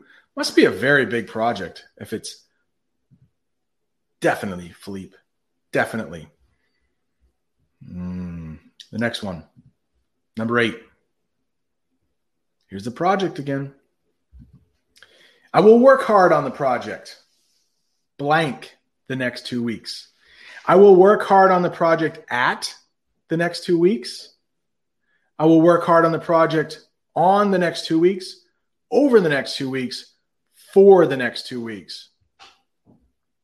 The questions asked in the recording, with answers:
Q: I will work hard on the project, blank, the next two weeks.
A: They both work.